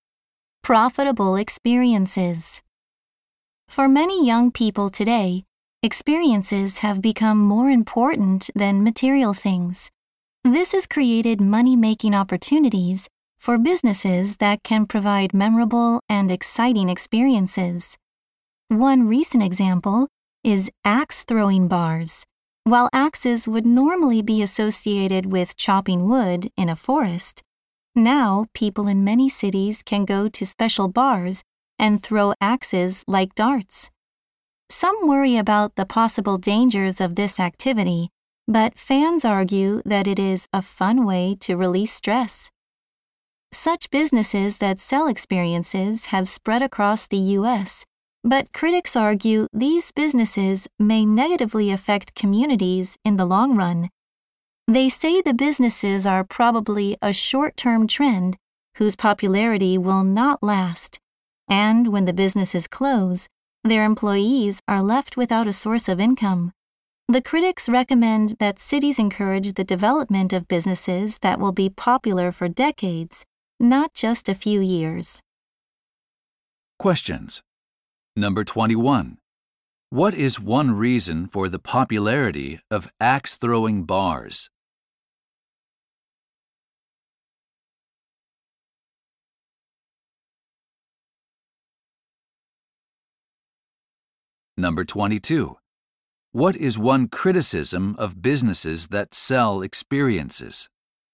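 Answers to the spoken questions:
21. They are a fun way to release stress.
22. They are likely a short-term trend, leaving employees without income when they close.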